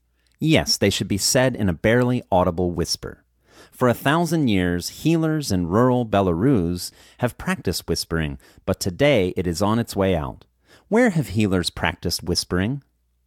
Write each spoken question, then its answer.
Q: Where have healers practiced whispering?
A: Healers have practiced whispering in rural Belarus.